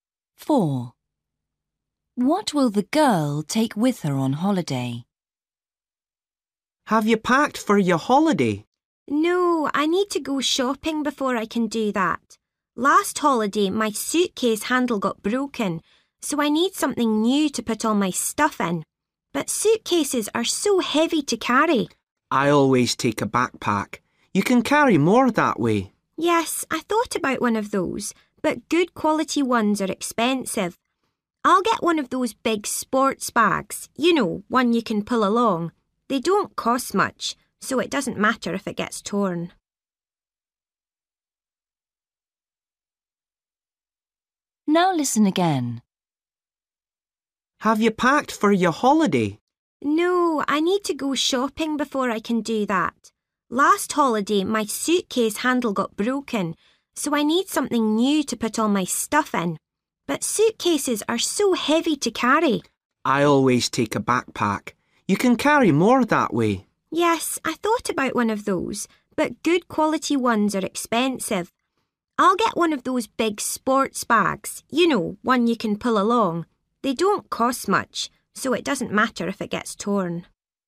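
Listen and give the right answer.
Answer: a big sports bag you can pull along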